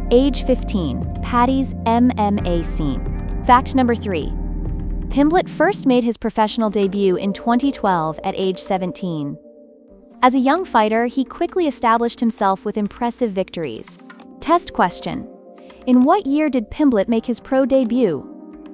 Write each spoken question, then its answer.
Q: in what year did Pimblett make his pro debut?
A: 2012.